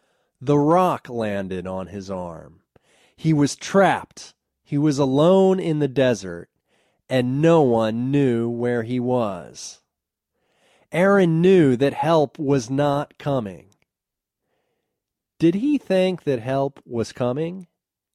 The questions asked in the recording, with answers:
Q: Did he think that help was coming?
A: No, he knew that help was not coming.